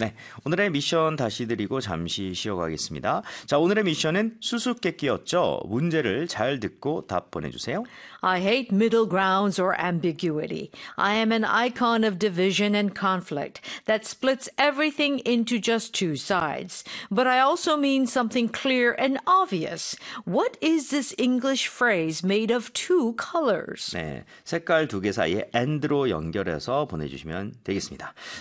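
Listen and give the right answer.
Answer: black and white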